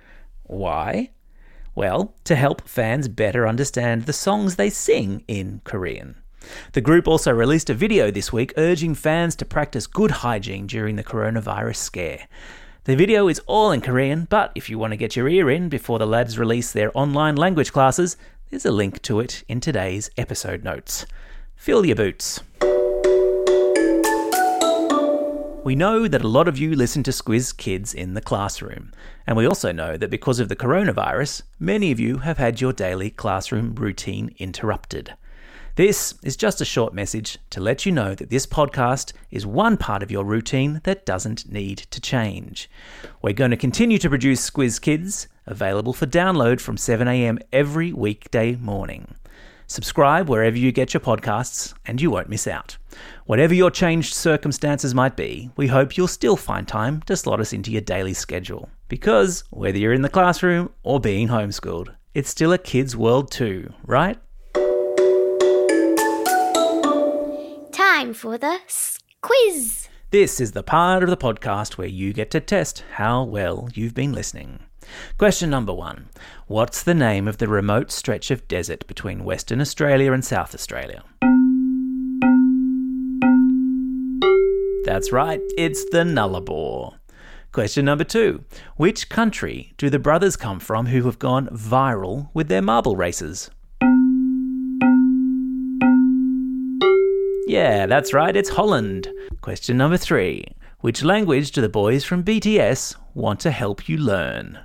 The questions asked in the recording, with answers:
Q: What's the name of the remote stretch of desert between Western Australia and South Australia?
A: That's right, it's the Nullarbor.